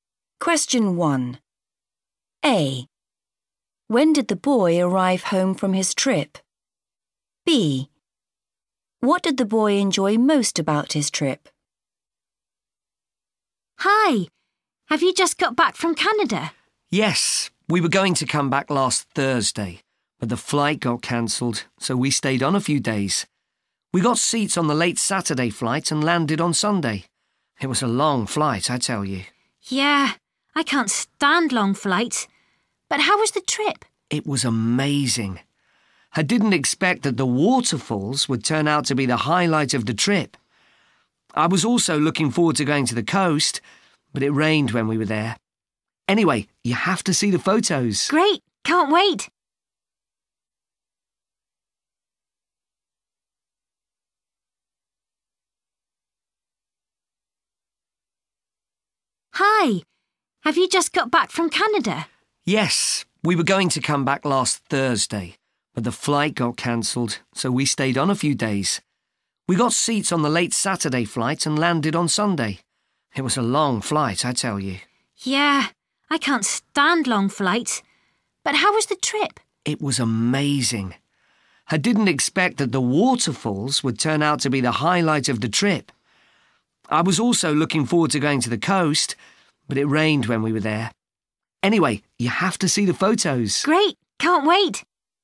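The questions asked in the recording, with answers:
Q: When did the boy arrive home from his trip?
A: On Sunday

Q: What did the boy enjoy most about his trip?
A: The waterfalls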